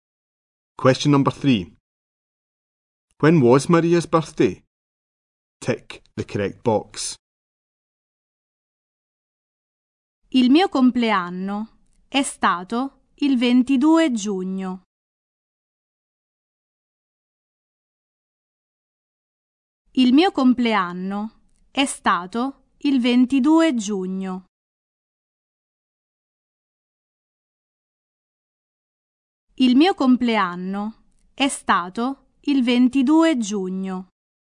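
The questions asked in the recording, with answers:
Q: When was Maria's birthday?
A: 22nd June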